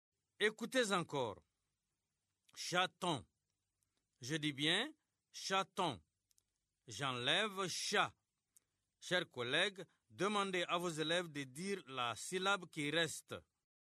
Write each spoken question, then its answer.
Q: Chers collègues, demandez à vos élèves de dire la syllabe qui reste.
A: Il reste ton.